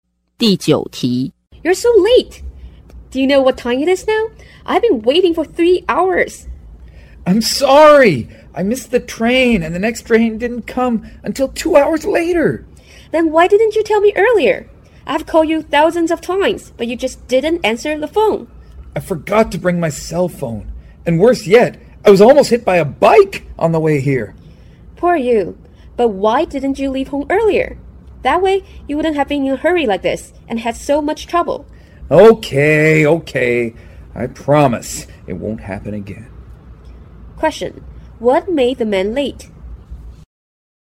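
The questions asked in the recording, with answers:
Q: What made the man late?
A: He missed the train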